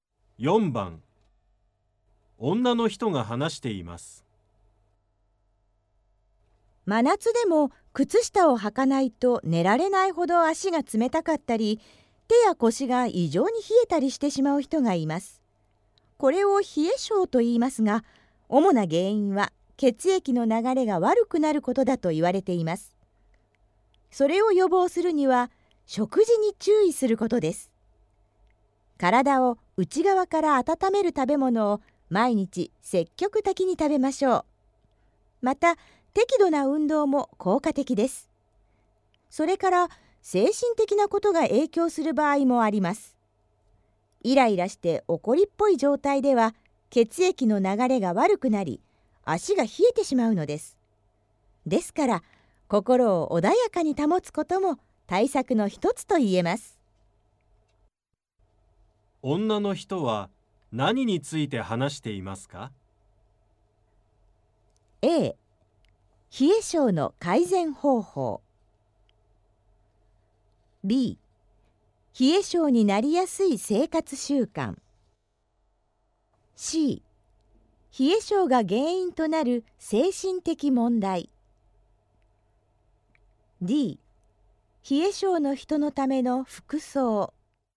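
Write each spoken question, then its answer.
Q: 女の人は何について話していますか?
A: A: 冷え性の改善方法。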